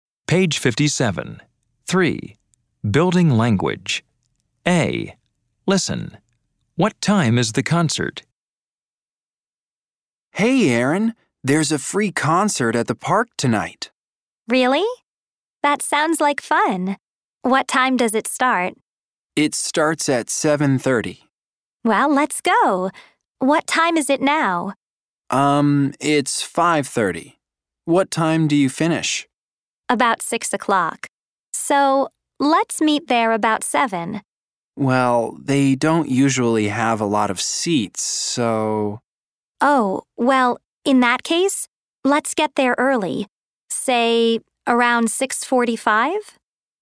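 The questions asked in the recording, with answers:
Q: What time is the concert?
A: 7:30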